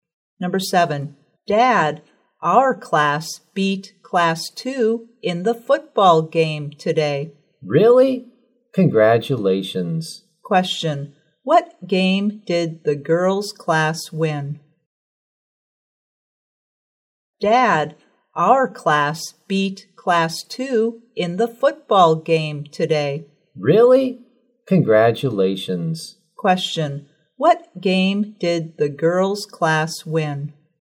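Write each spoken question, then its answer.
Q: what game did the girls' class win?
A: A football game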